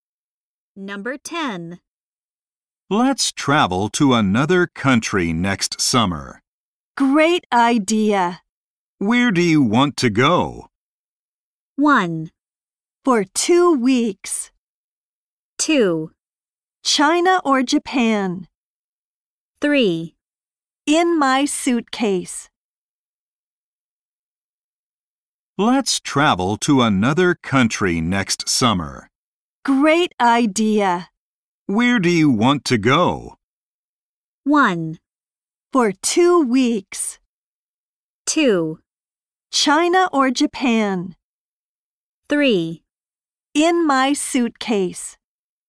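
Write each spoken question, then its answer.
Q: Where do you want to go?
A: 2: China or Japan?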